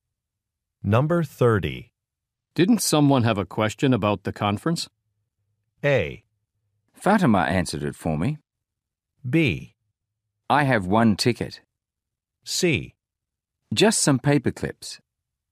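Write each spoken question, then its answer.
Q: Didn't someone have a question about the conference?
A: A: Fatima answered it for me.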